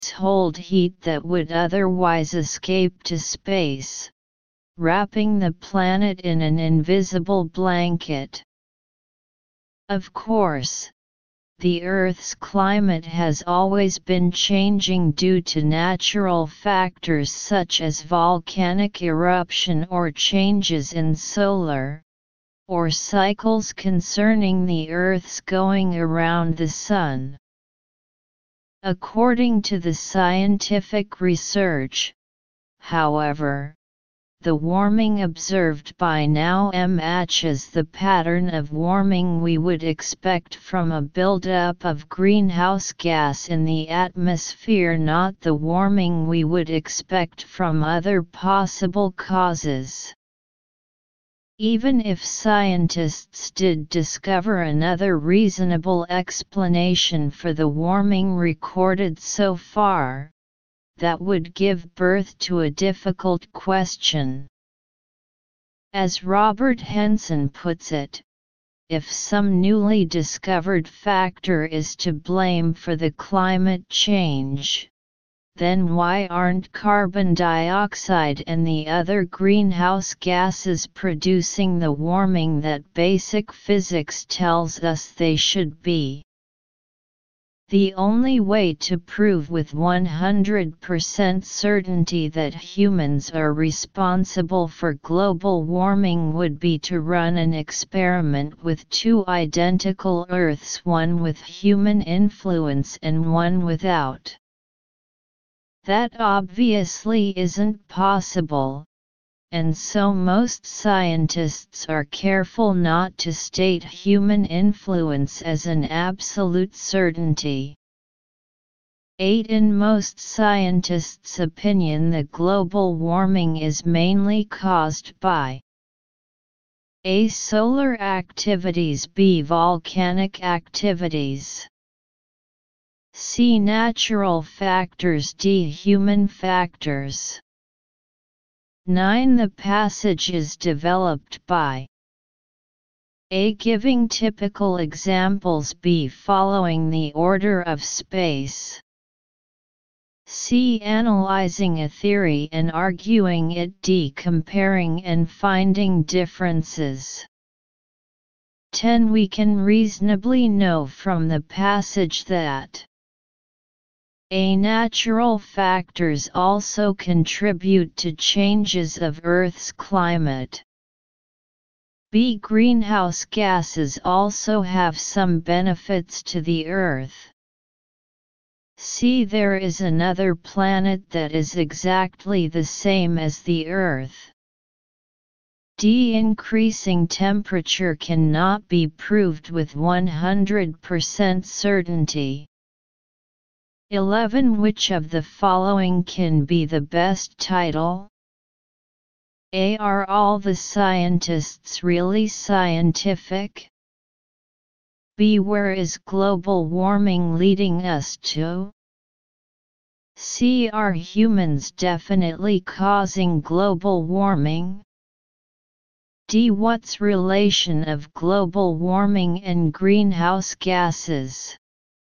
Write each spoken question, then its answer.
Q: In most scientists' opinion, the global warming is mainly caused by A.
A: Answer 8. D.

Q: The passage is developed by A.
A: 9. C.

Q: We can reasonably know from the passage that A.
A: 10. A.

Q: Which of the following can be the best title?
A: 11. C.